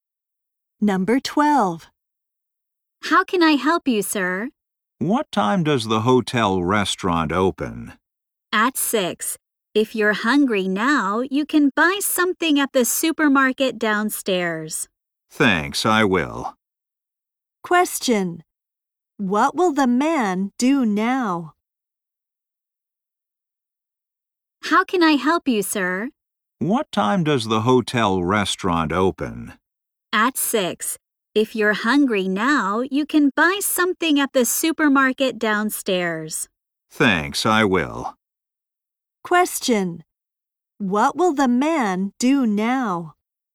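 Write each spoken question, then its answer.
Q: What will the man do now?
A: Buy something at the supermarket downstairs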